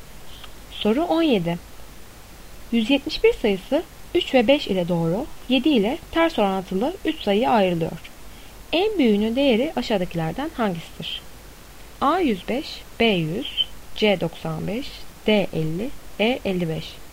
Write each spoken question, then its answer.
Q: En büyüğünün değeri aşağıdakilerden hangisidir?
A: Doğru cevap A 105.